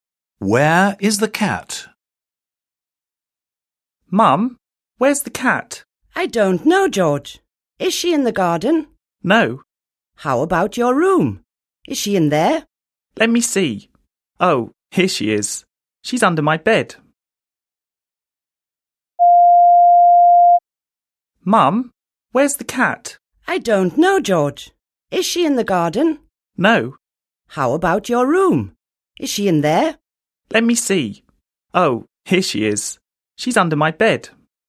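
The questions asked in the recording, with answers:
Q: Where is the cat?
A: under George's bed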